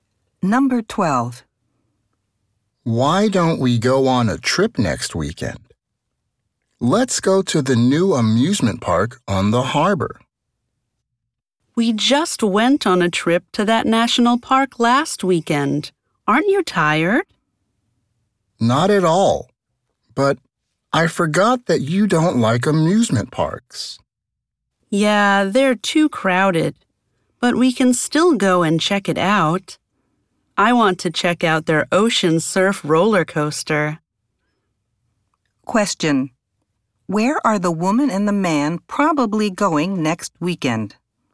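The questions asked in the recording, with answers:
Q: Where are the woman and the man probably going next weekend?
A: To the new amusement park on the harbor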